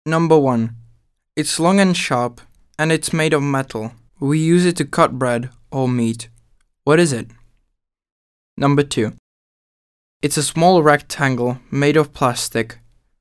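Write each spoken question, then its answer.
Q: What is it?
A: a knife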